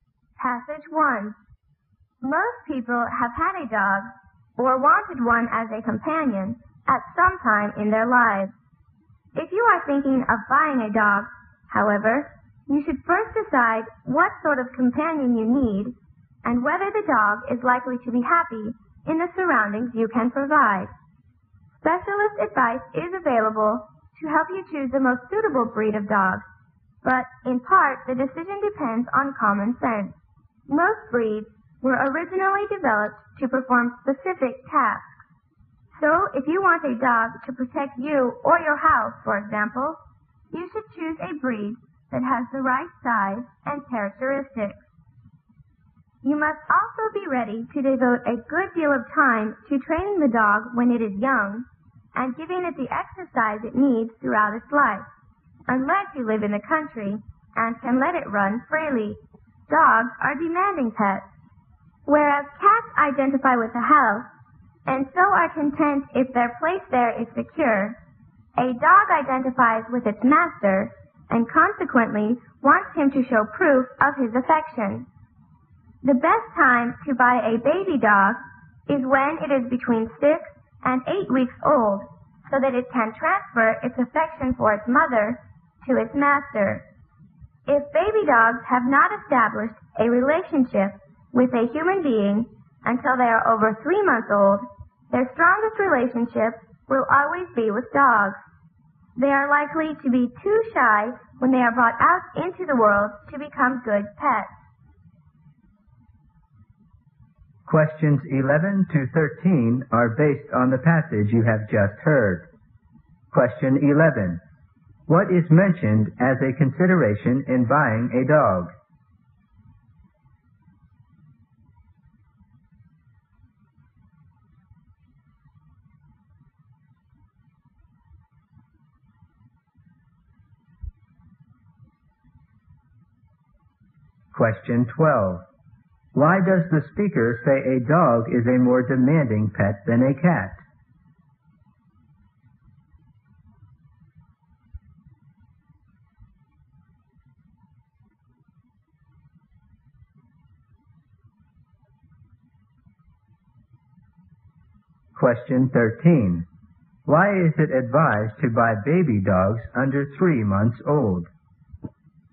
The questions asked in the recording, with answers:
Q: What is mentioned as a consideration in buying a dog?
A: 狗是否能适应环境

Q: Why does the speaker say a dog is a more demanding pet than a cat?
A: 他需要更多的爱抚啊,需要更多的 love 和 care 啊。

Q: Why is it advised to buy baby dogs under 3 months old?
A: 因为他们更加容易呢转移他的这种感情啊